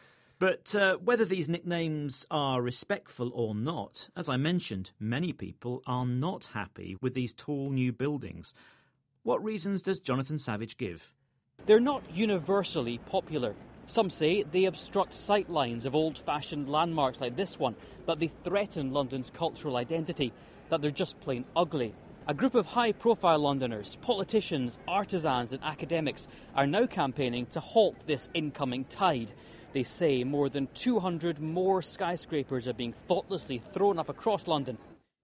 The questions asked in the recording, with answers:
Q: What reasons does Jonathan Savage give?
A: They said they obstruct sight lines.